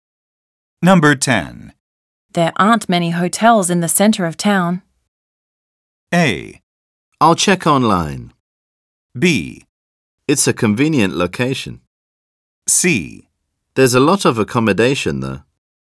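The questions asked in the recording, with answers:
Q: There aren't many hotels in the center of town.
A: A: I'll check online.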